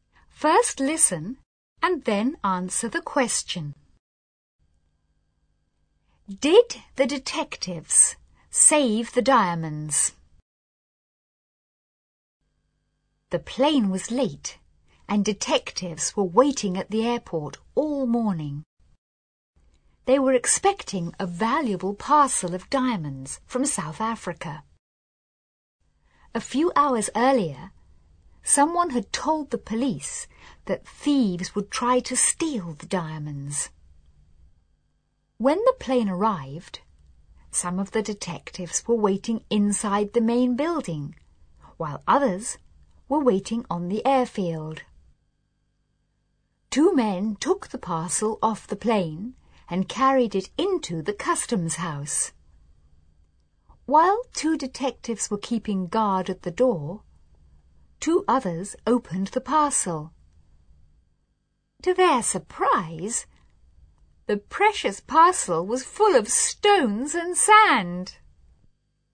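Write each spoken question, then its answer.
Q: Did the detectives save the diamonds?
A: No, the parcel was full of stones and sand.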